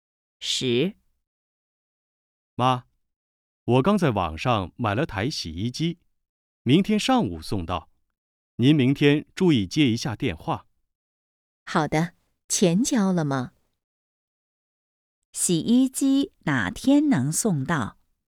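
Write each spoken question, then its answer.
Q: 洗衣机哪天能送到?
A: 明天上午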